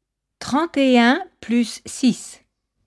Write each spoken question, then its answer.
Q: 31 plus 6.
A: Ça fait 37.